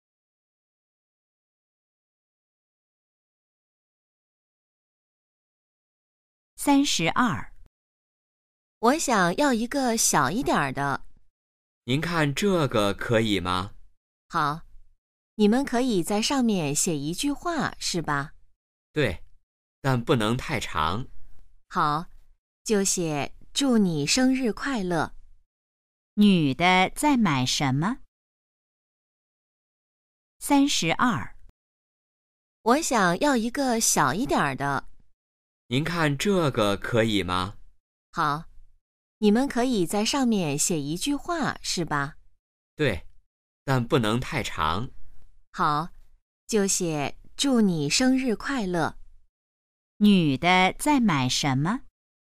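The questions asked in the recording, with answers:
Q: 女的在买什么?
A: 生日蛋糕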